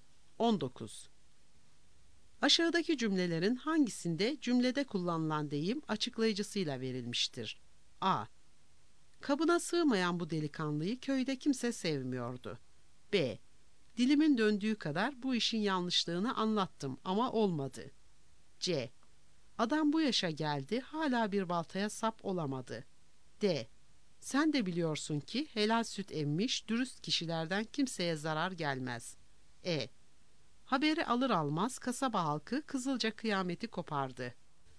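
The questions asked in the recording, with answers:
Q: Aşağıdaki cümlelerin hangisinde cümlede kullanılan deyim açıklayıcısıyla verilmiştir?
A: D: Sen de biliyorsun ki helal süt emmiş, dürüst kişilerden kimseye zarar gelmez.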